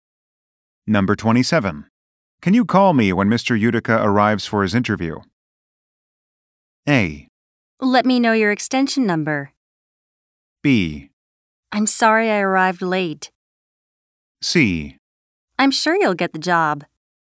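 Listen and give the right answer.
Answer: A: Let me know your extension number.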